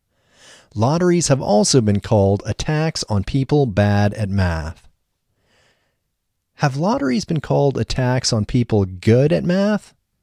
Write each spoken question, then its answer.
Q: Have lotteries been called a tax on people good at math?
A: No, they haven't been called a tax on people good at math.